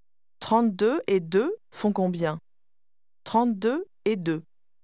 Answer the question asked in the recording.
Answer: 34.